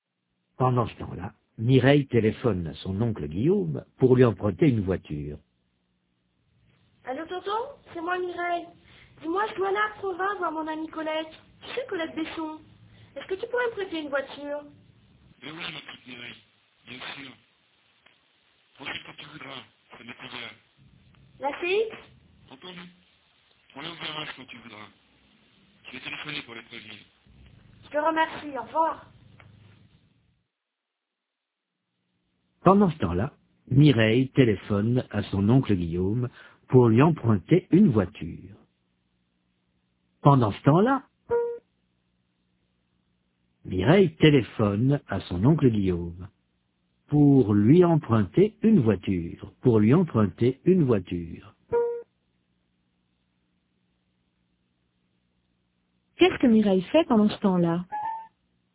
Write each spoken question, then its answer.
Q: Qu'est-ce que Mireille fait pendant ce temps-là?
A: Elle téléphone à son oncle Guillaume.